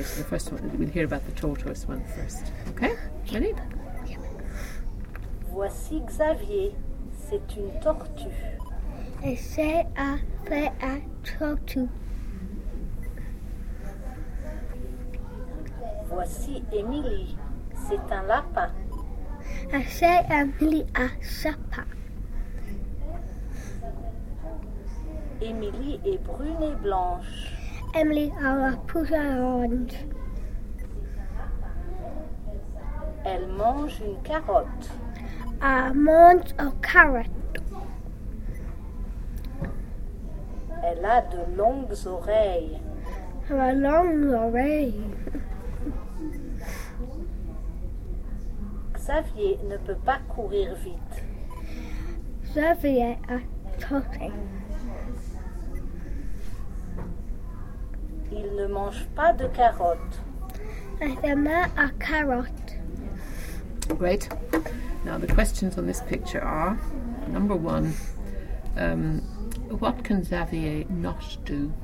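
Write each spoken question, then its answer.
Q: what can Xavier not do?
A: He can't run fast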